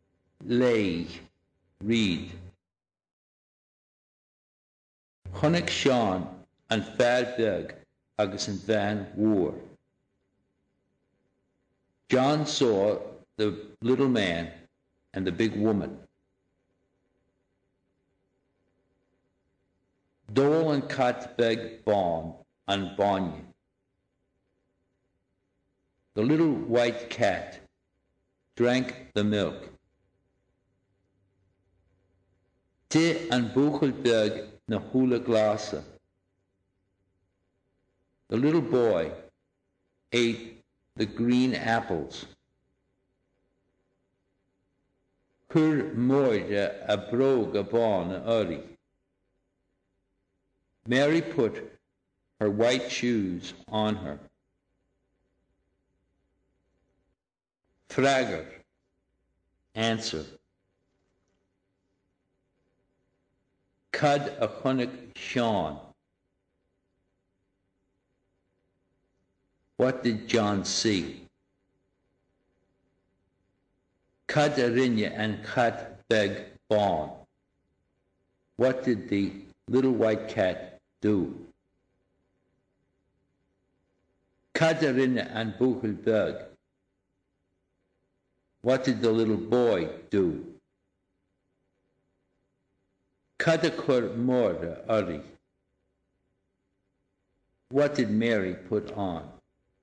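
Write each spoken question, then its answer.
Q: What did John see?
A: The little man and the big woman

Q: What did the little white cat do?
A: It drank the milk

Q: What did the little boy do?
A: He ate the green apples

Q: What did Mary put on?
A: Her white shoes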